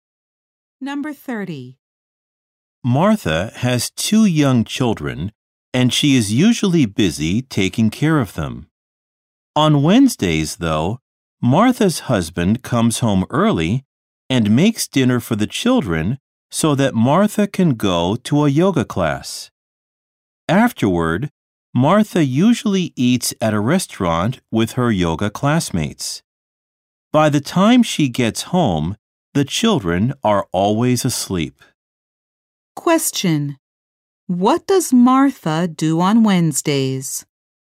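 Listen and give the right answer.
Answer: She goes to a yoga class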